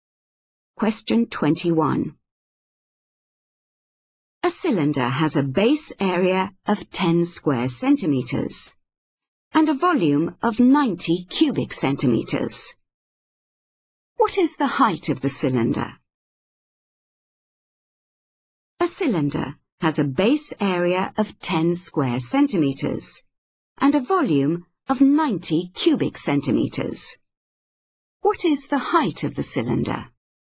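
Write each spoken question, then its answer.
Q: What is the height of the cylinder?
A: 9 centimeters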